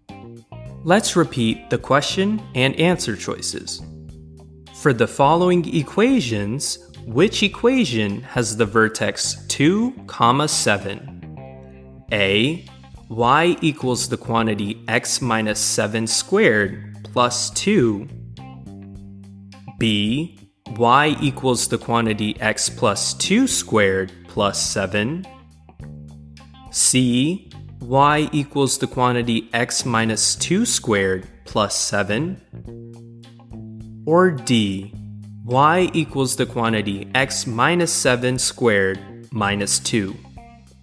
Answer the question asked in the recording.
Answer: Answer choice C, y equals the quantity x minus 2 squared plus 7, is correct here.